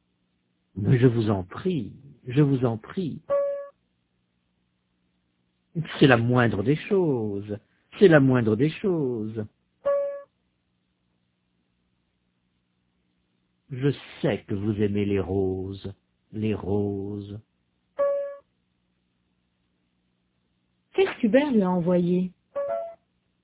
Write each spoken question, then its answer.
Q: Qu'est-ce qu'Hubert lui a envoyé?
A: Des roses.